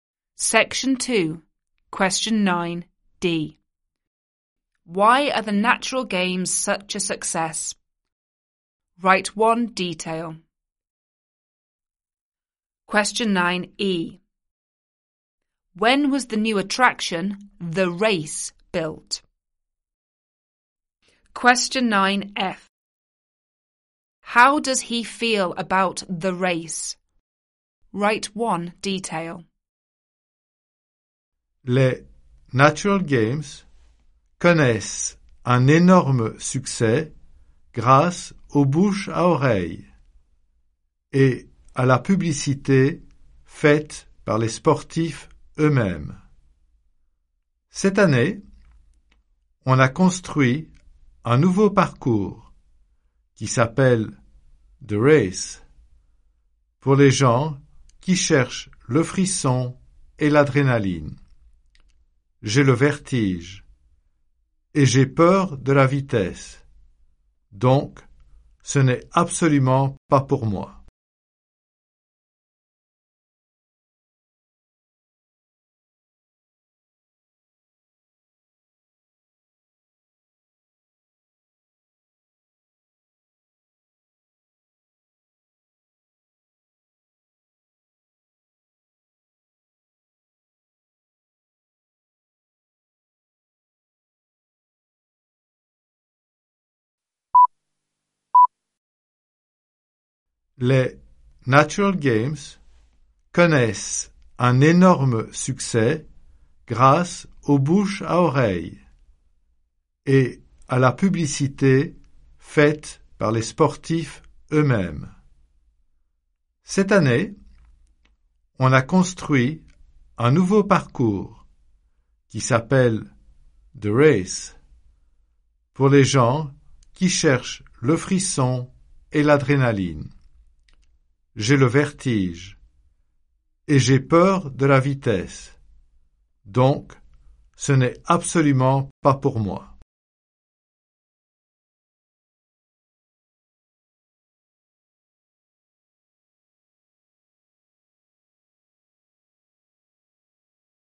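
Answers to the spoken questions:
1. Word of mouth and publicity by the athletes themselves
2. This year
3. It's not for him; he is afraid of heights and speed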